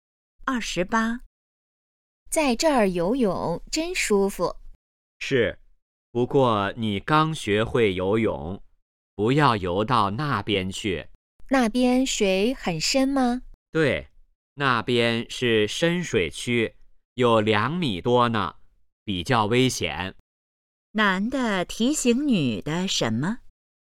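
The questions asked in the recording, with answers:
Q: 男的提醒女的什么?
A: 不要游到深水区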